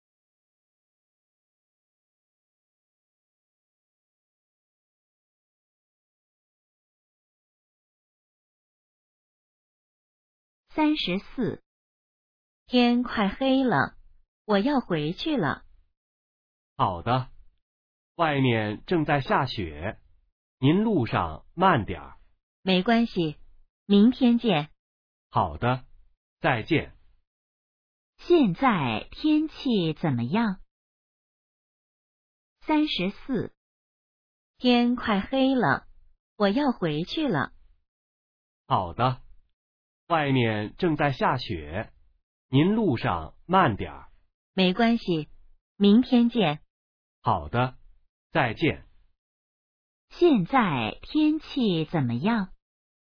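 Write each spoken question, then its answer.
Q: 现在天气怎么样?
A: 正在下雪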